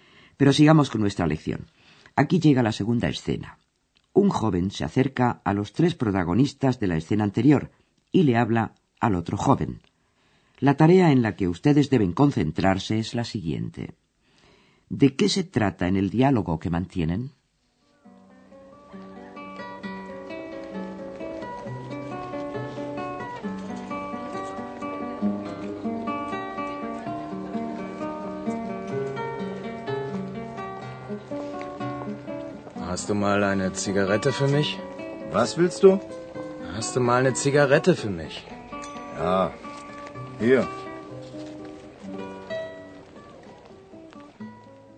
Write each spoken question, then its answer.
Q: ¿De qué se trata en el diálogo que mantienen?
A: el joven que llega le pregunta al otro que si tiene un cigarrillo para él.